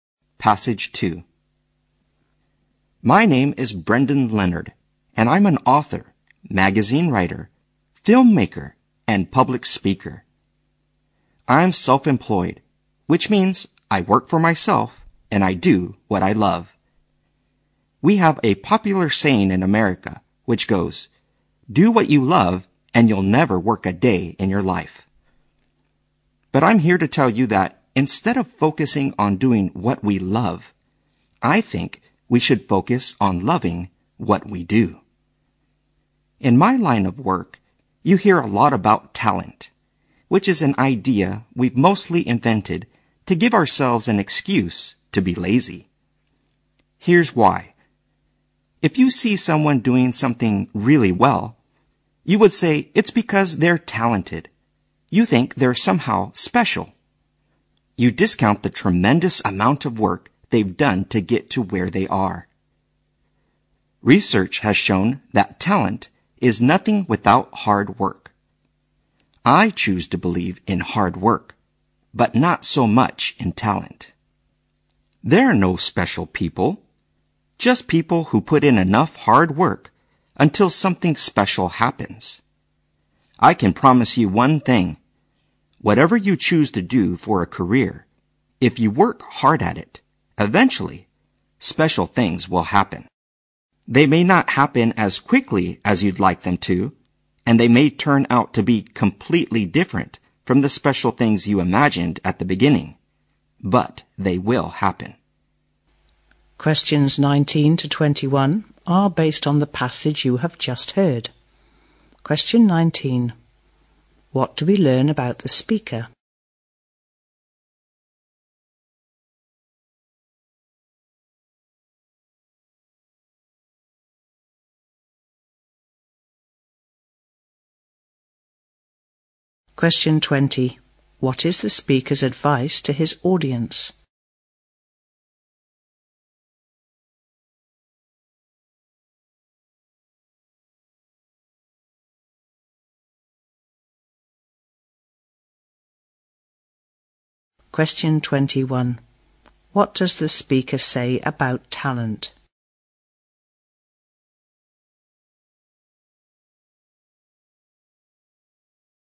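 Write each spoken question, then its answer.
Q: What is the speaker's advice to his audience?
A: Love what you do

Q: What does the speaker say about talent?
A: It is nothing without hard work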